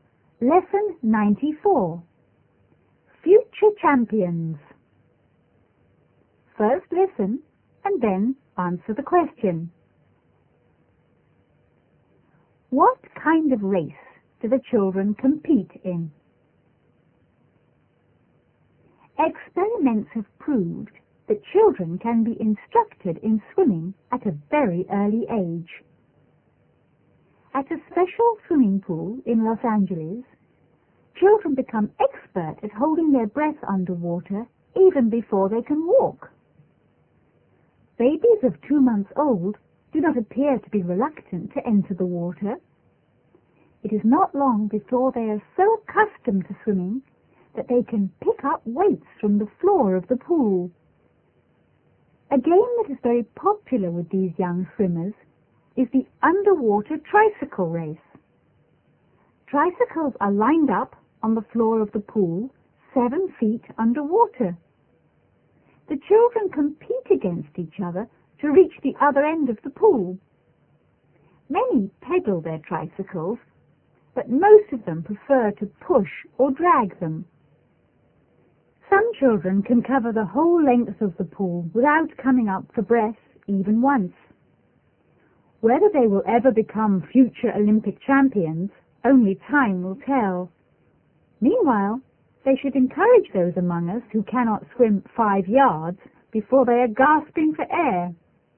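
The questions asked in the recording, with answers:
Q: What kind of race do the children compete in?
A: An underwater tricycle race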